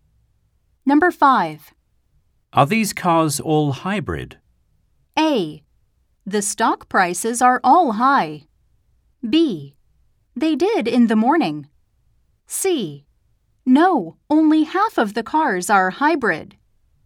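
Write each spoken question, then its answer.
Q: Are these cars all hybrid?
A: C: No, only half of the cars are hybrid.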